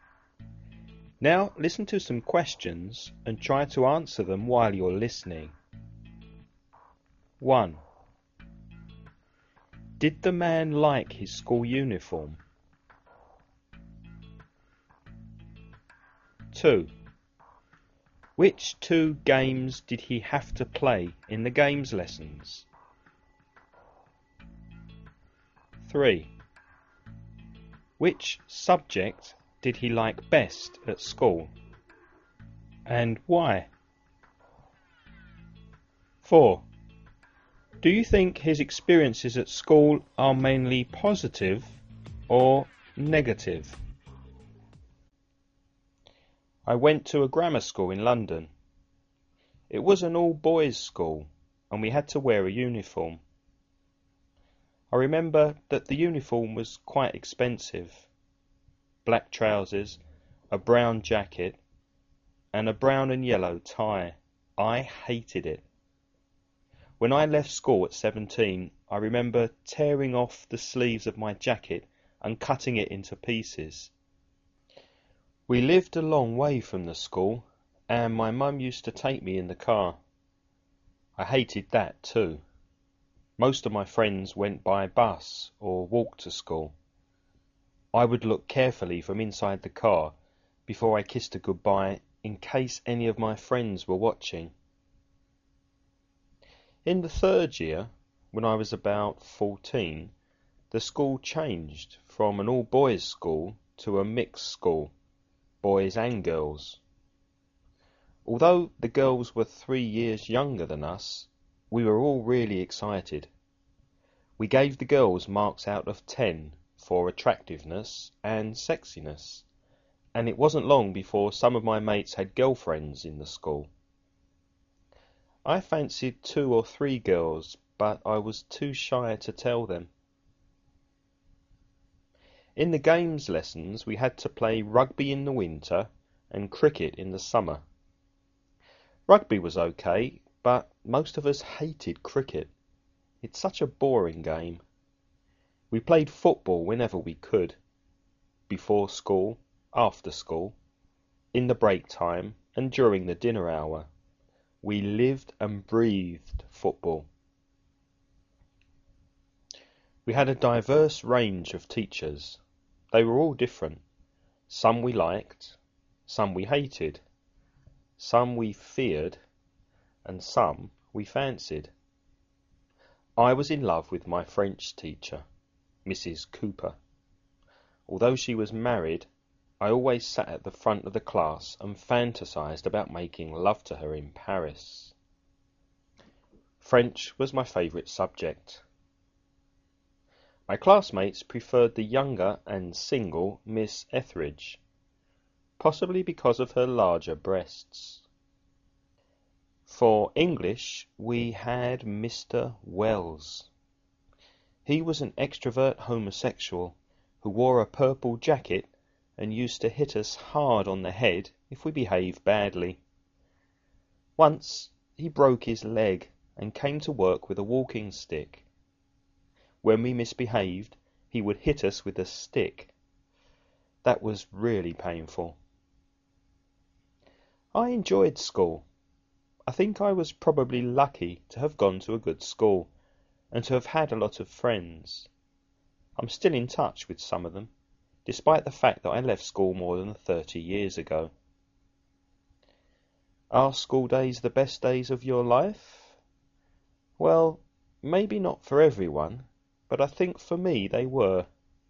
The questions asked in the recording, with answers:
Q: Did the man like his school uniform?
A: No, he didn't.

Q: Which two games did he have to play in the games lessons?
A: Cricket and rugby.

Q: Which subject did he like best at school?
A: French, because he fancied the French teacher.

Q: Do you think his experiences at school are mainly positive or negative?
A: Mainly positive. He says they are the best days of his life.